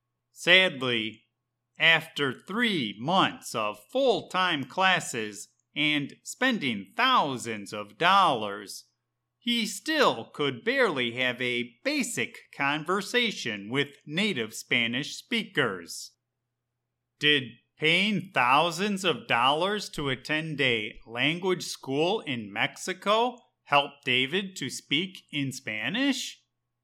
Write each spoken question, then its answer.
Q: Did paying thousands of dollars to attend a language school in Mexico helped David to speak in Spanish?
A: Sadly, no. After traveling to Mexico and spending thousands of dollars, David could barely have a basic conversation with native Spanish speakers.